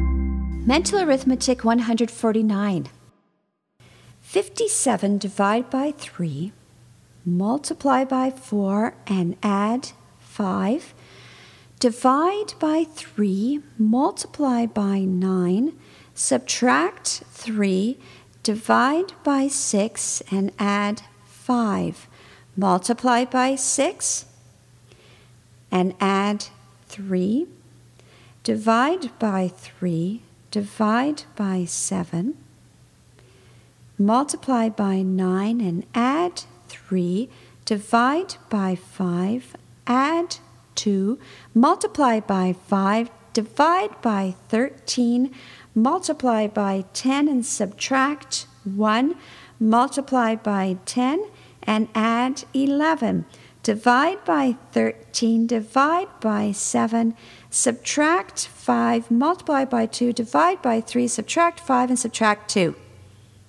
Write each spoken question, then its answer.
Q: 57 divide by 3, multiply by 4, and add 5. Divide by 3, multiply by 9, subtract 3, divide by 6, and add 5. Multiply by 6, and add 3. Divide by 3, divide by 7. Multiply by 9 and add 3. Divide by 5, add 2. Multiply by 5, divide by 13. Multiply by 10 and subtract 1. Multiply by 10 and add 11. Divide by 13, divide by 7, subtract 5, multiply by 2, divide by 3, subtract 5, and subtract 2.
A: And the answer is negative 3.